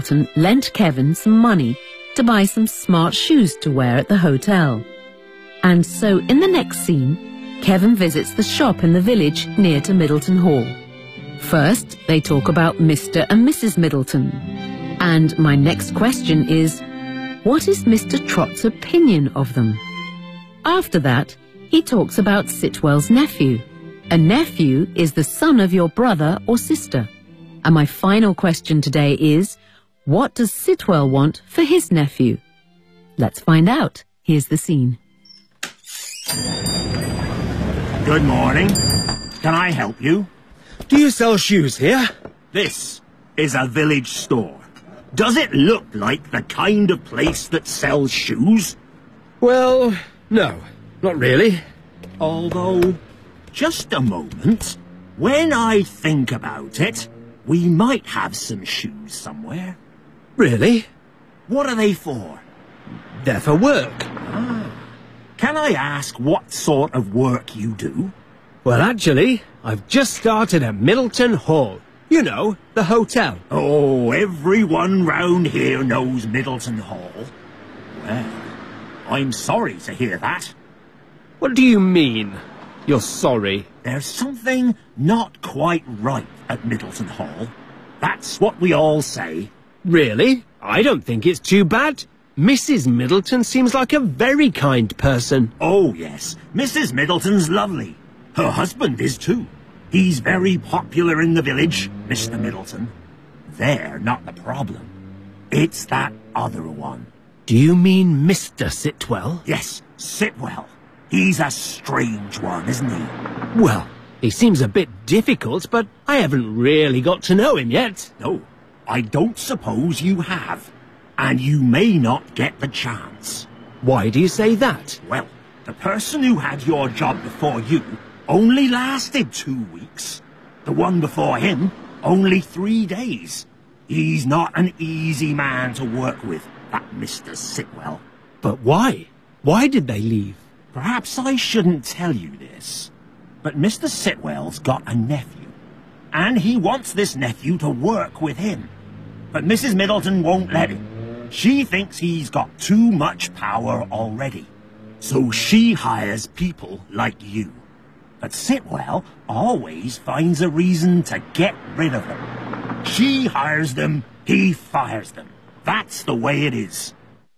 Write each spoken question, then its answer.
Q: what is Mr. Trott's opinion of them?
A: Mrs. Middleton's lovely. Her husband is too.

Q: what does Sitwell want for his nephew?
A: he wants this nephew to work with him, but Mrs.